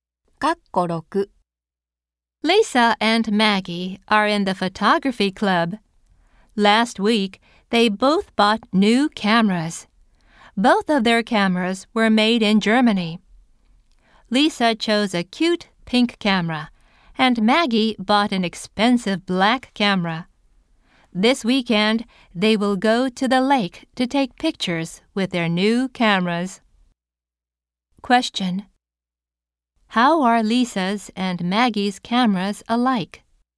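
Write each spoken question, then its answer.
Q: How are Lisa's and Maggie's cameras alike?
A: Both were made in Germany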